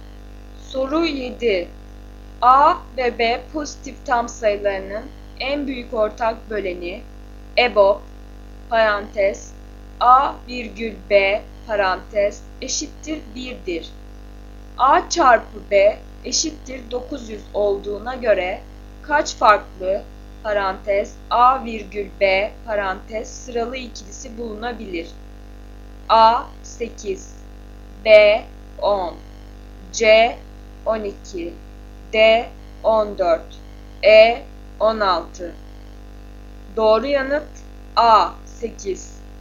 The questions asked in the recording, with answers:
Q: A çarpı B eşittir 900 olduğuna göre kaç farklı parantez A virgül B parantez sıralı ikilisi bulunabilir?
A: Doğru yanıt A 8.